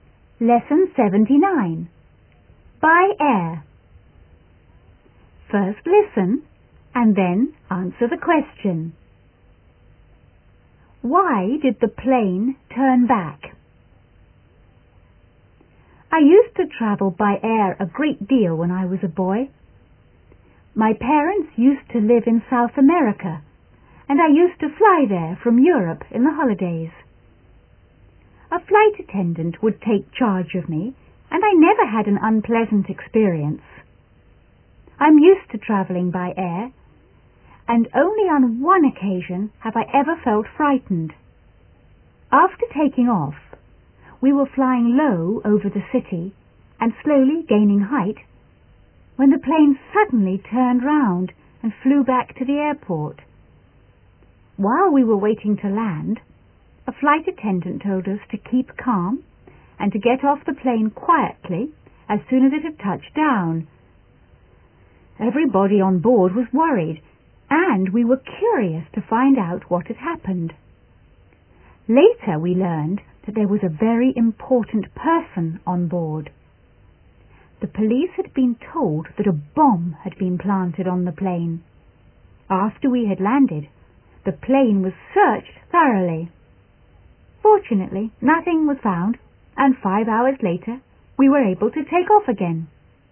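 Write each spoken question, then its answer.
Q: Why did the plane turn back?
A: The police had been told that a bomb had been planted on the plane.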